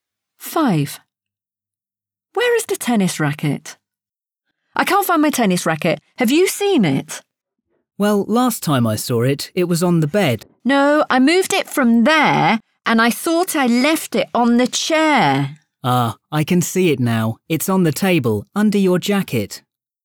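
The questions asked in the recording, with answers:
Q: Where is the tennis racket?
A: on the table, under the jacket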